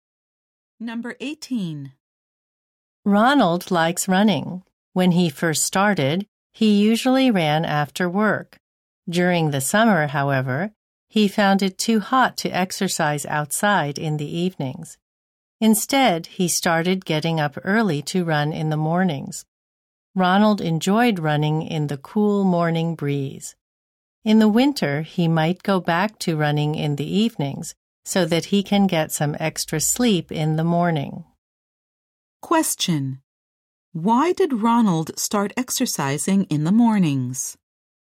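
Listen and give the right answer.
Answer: It was too hot to run in summer evenings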